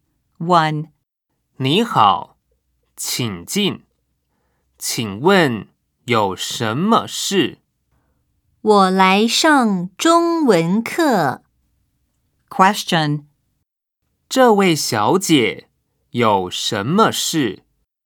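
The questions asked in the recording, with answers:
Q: 这位小姐有什么事?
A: 她来上中文课。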